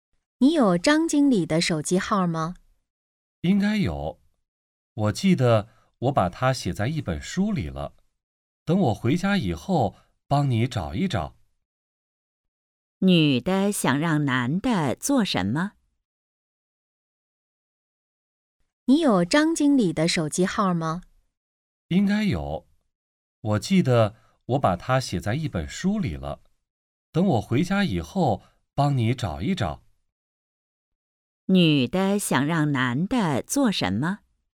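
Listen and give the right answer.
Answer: 找张经理的手机号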